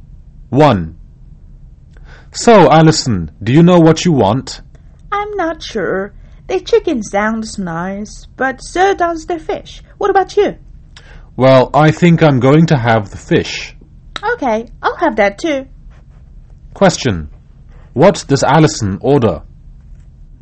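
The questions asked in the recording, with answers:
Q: What does Alison order?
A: The fish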